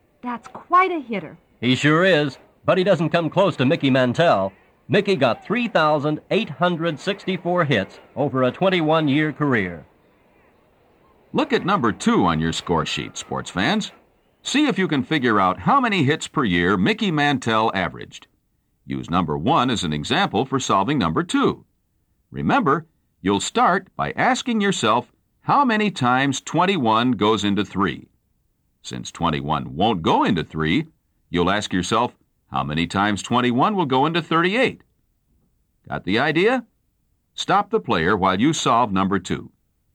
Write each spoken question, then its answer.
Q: See if you can figure out how many hits per year Mickey Mantell averaged.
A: That means that Mickey Mantell averaged 184 hits per year.